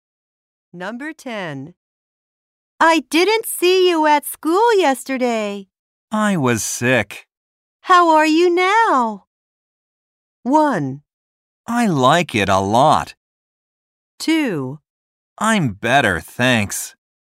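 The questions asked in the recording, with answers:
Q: How are you now?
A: 2: I'm better, thanks.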